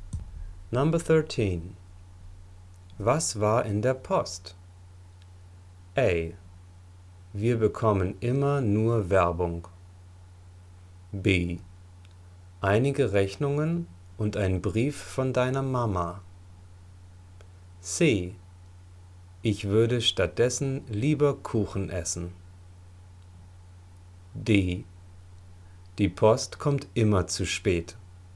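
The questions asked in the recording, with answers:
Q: Was war in der Post?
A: B: Einige Rechnungen und ein Brief von deiner Mama.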